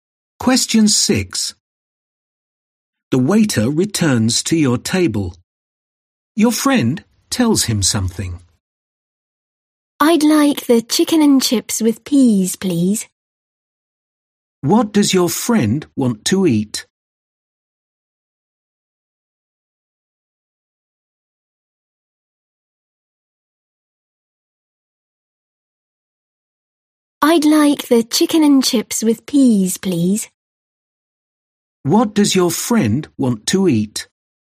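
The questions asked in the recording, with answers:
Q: What does your friend want to eat?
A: Chicken and chips with peas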